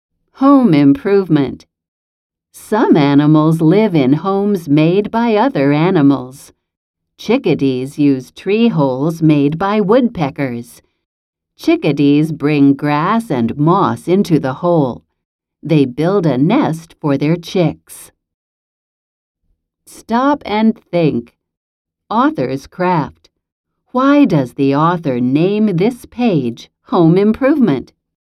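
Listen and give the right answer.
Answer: Because chickadees improve holes that woodpeckers made by adding grass and moss to build a nest.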